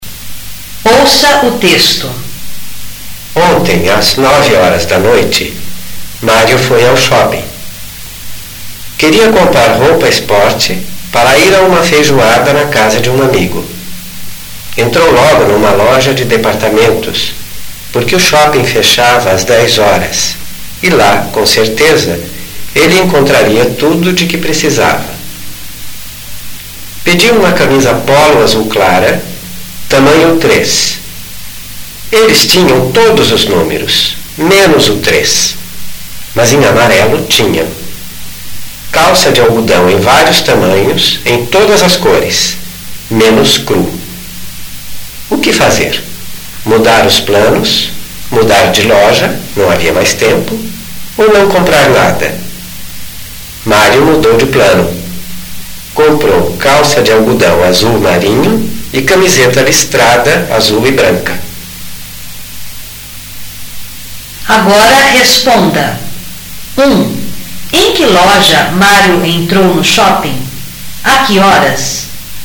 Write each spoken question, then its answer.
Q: Em que loja Mário entrou no shopping? A que horas?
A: Mário entrou numa loja de departamentos às 9 horas da noite.